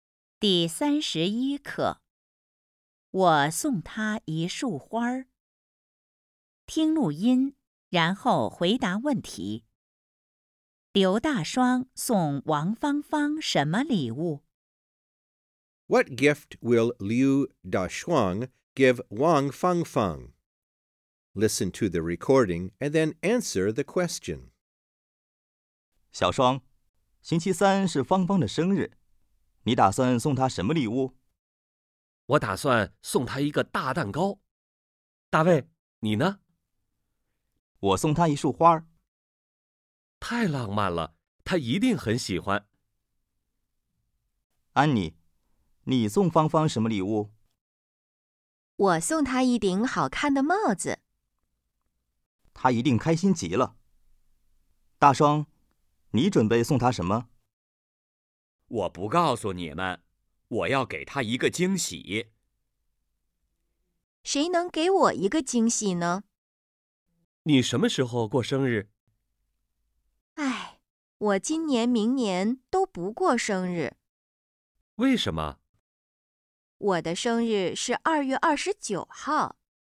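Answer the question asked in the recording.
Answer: 他没说,要给她一个惊喜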